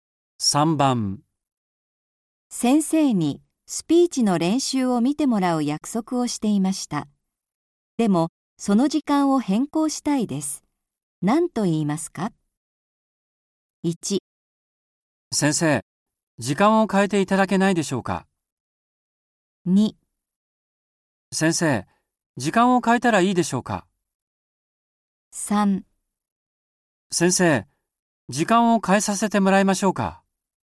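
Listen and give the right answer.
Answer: 1: 先生、時間を変えていただけないでしょうか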